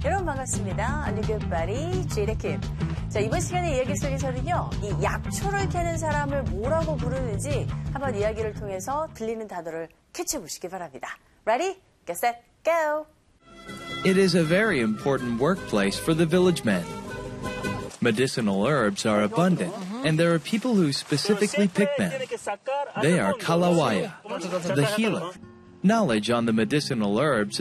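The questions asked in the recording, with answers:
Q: 이 약초를 캐는 사람을 뭐라고 부르는지 한번 이야기를 통해서 들리는 단어를 캐치해 보시기 바랍니다.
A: 칼라와야 (Kalawaya)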